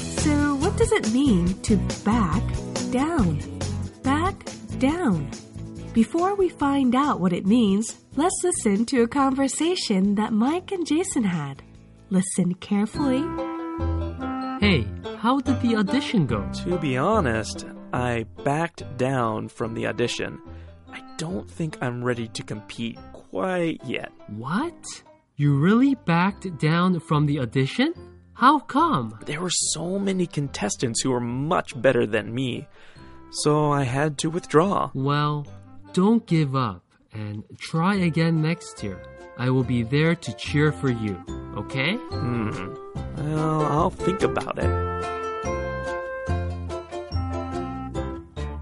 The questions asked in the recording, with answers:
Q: What does it mean to back down?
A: When you back down, it means to withdraw from a previously held position, especially when facing a stronger opponent.